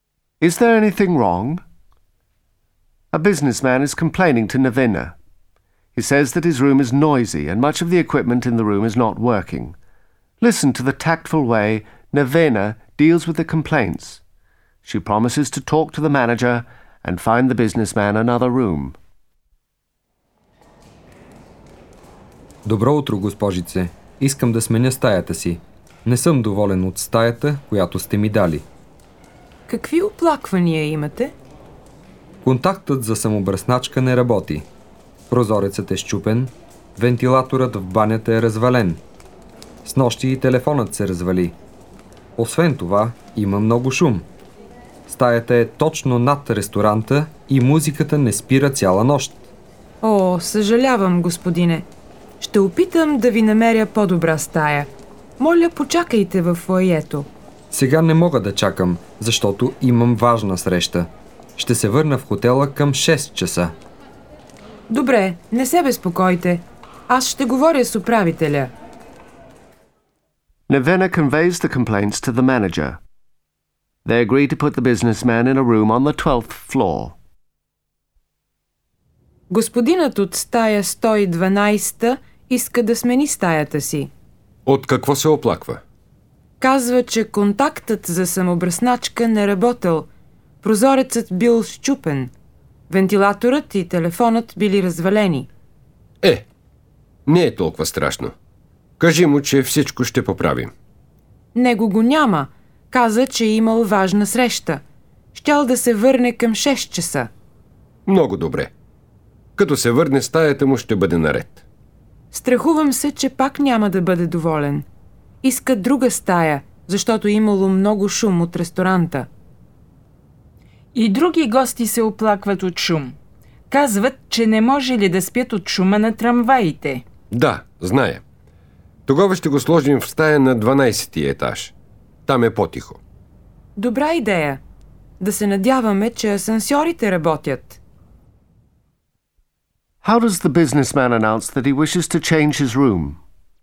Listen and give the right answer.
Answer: Искам да сменя стаята си.